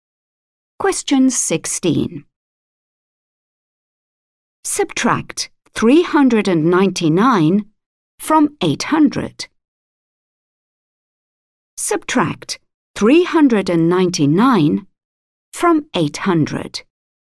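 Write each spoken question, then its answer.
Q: Subtract 399 from 800.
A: 401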